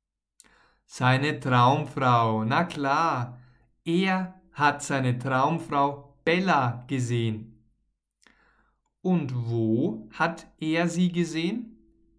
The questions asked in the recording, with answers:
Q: Und wo hat er sie gesehen?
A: An der Bushaltestelle. Er hat sie an der Bushaltestelle gesehen.